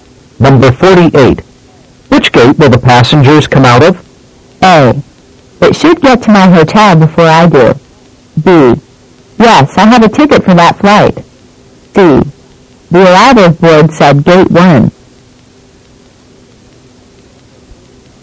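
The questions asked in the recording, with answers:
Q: Which gate will the passengers come out of?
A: C: The arrival board said gate 1.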